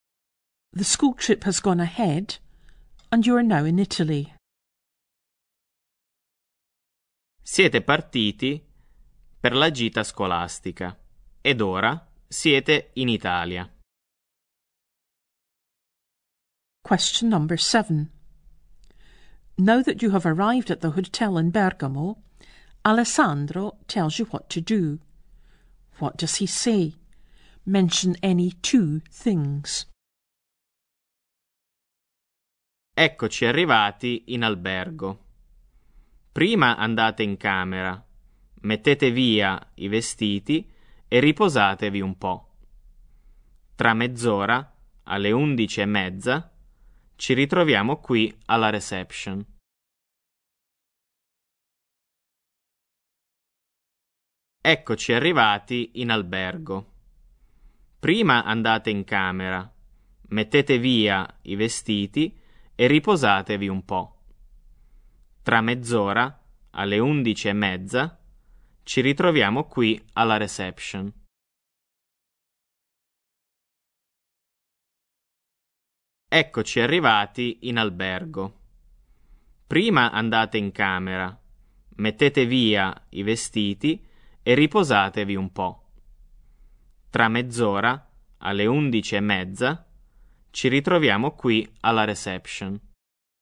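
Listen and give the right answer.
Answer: Go to your room, put your clothes away, rest a bit; meet at reception in half an hour, at 11:30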